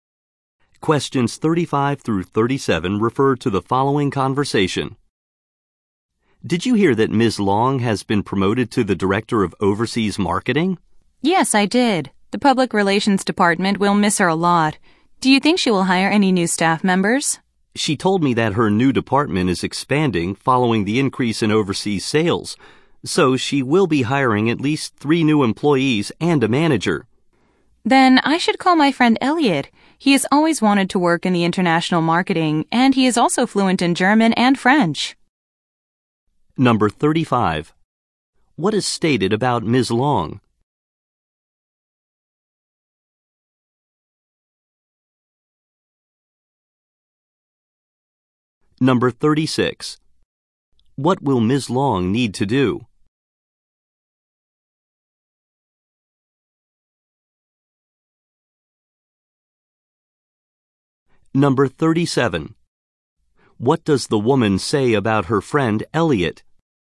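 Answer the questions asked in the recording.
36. Hire new employees
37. He speaks German and French and wants to work in international marketing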